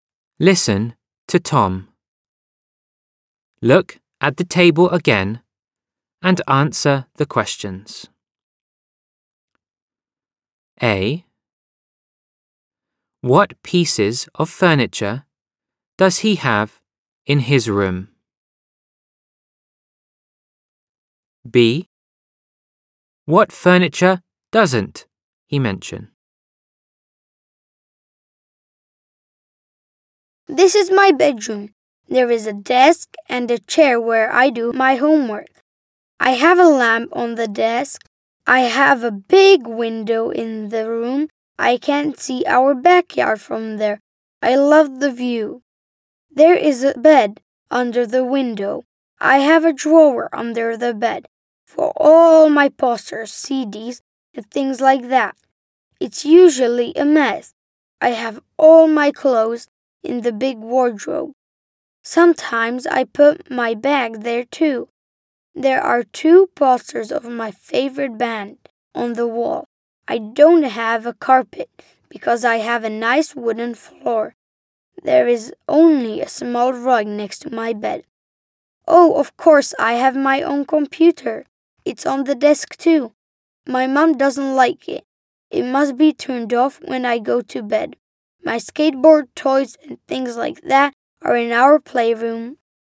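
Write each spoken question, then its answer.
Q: What pieces of furniture does he have in his room?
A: a desk, a chair, a lamp, a bed, a drawer, a wardrobe, a rug and a computer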